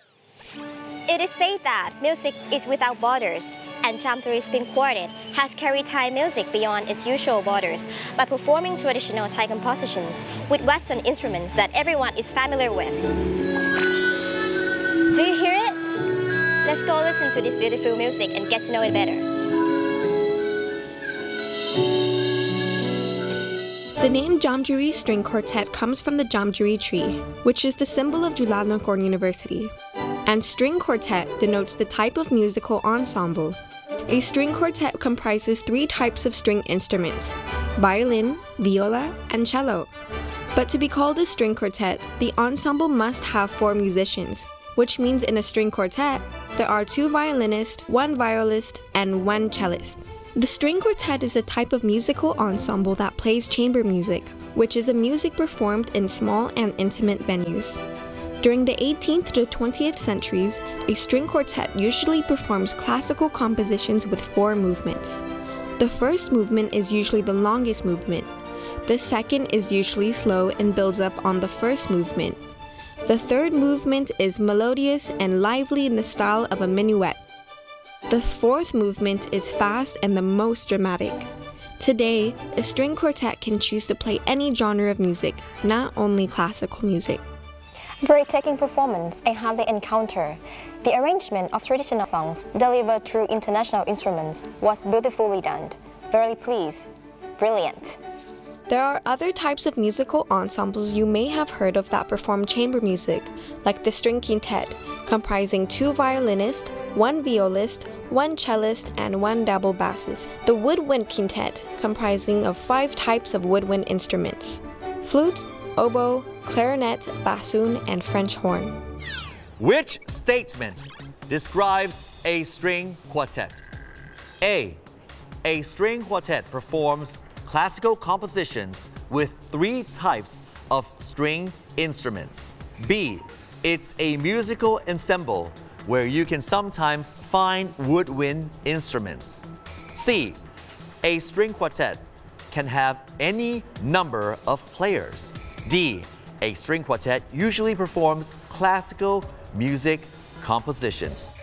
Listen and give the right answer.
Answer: A, a string quartet performs classical composition with three types of string instrument.